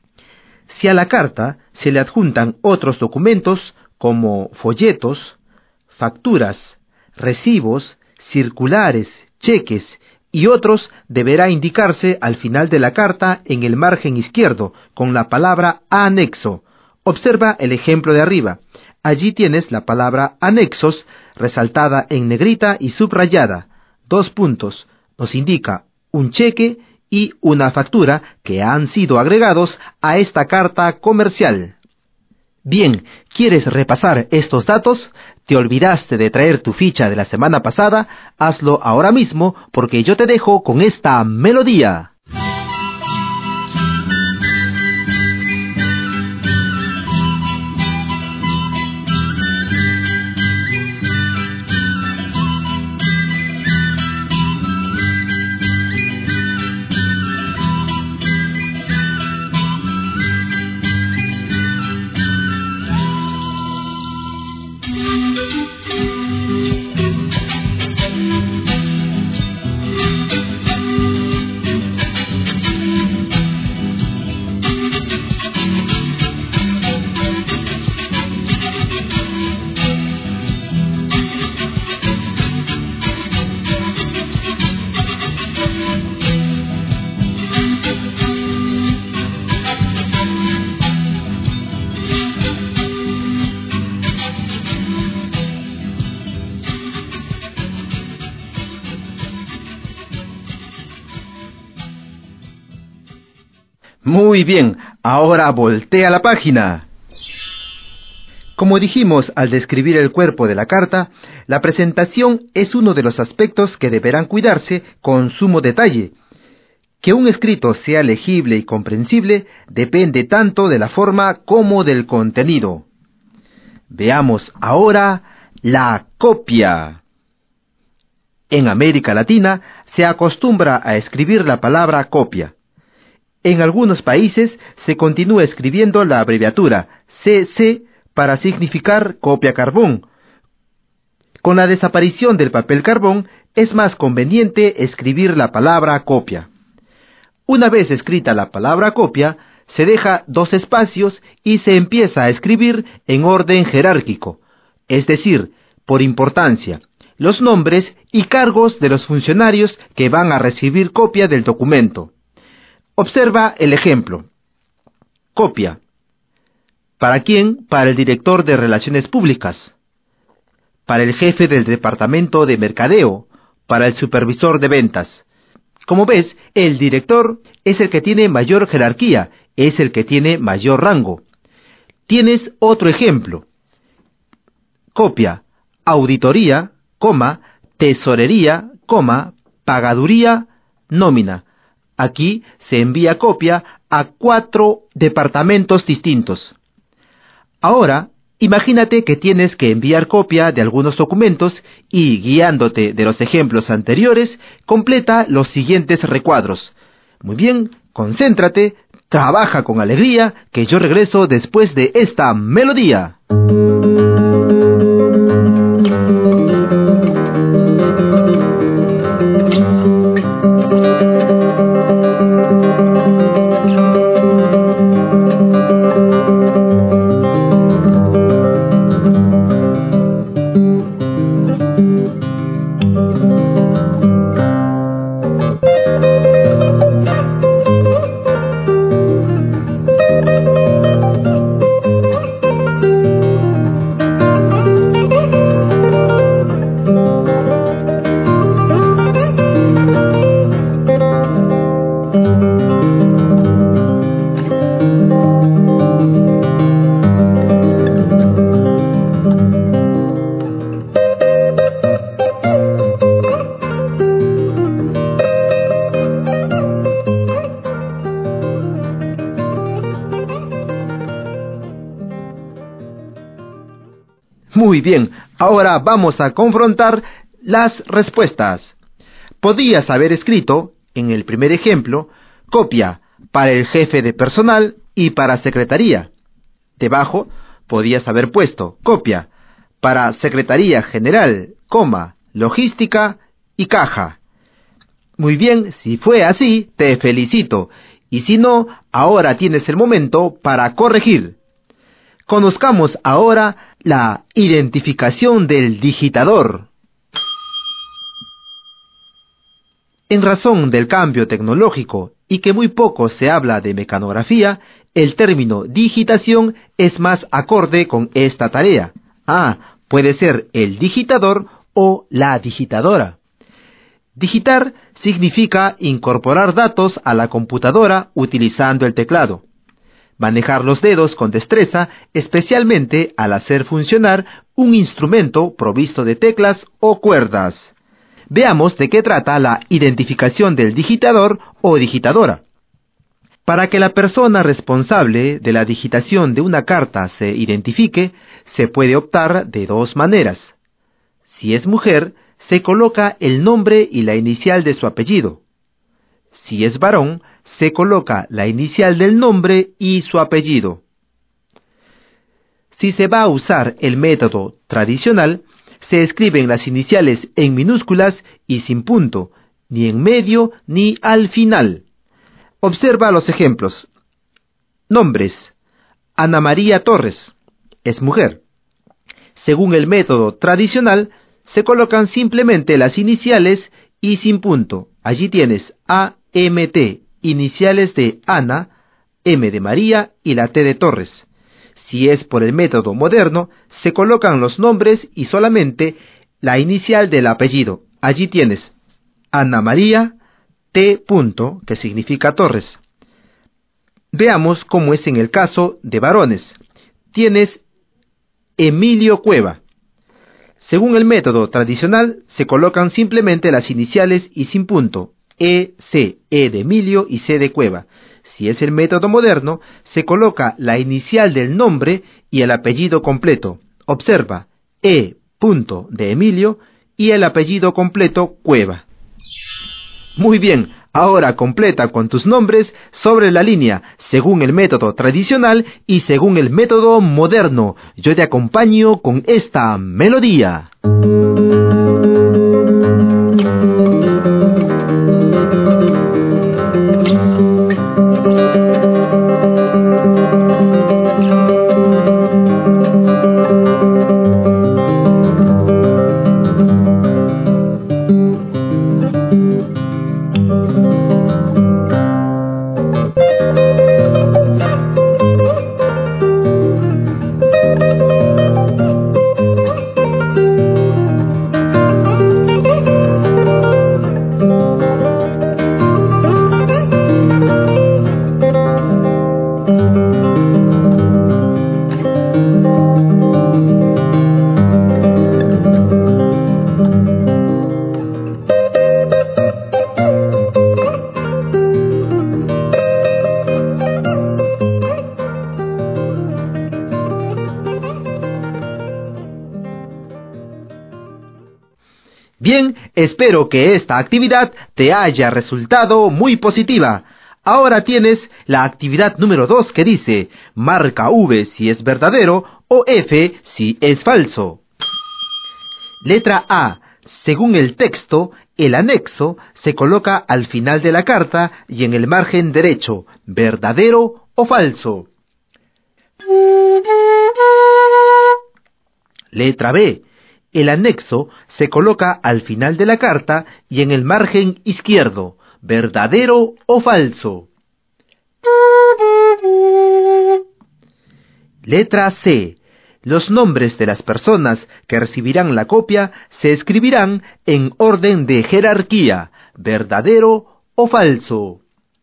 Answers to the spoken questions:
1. Esta afirmación es falsa.
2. Esta afirmación es verdadera.
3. Esta afirmación también es verdadera.